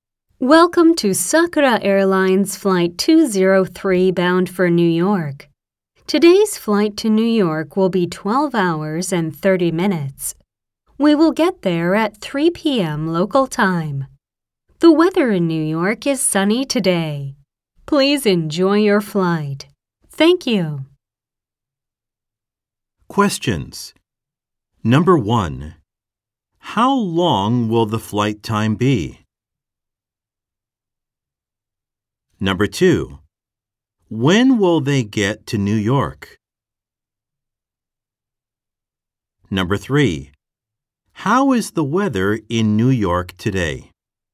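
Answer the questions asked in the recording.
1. 12 hours and 30 minutes
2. At 3 p.m. local time
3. Sunny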